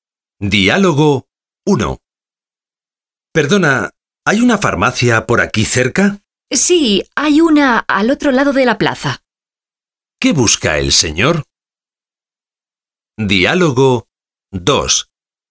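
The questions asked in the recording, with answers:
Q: ¿Qué busca el señor?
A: Una farmacia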